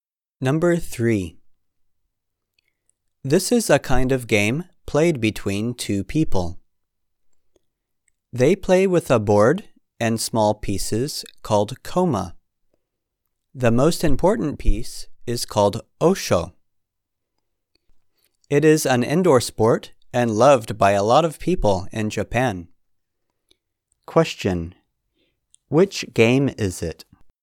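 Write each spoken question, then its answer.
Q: Which game is it?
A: Shogi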